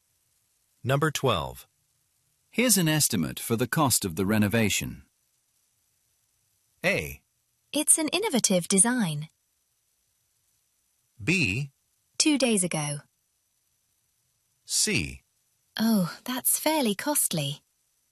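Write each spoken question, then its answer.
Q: Here's an estimate for the cost of the renovation.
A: C: Oh, that's fairly costly.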